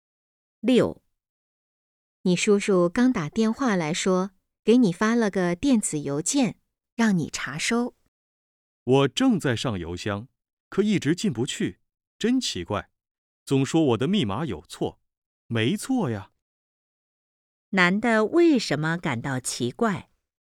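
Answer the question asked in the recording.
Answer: 邮箱进不去,总说密码有错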